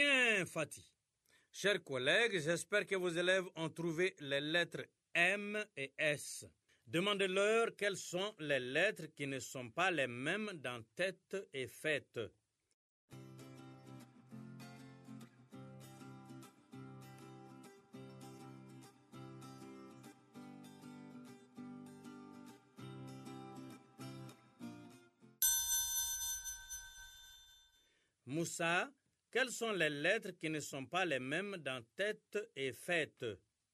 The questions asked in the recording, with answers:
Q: Moussa, quelles sont les lettres qui ne sont pas les mêmes dans tête et fête?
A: T dans tête et F dans fête.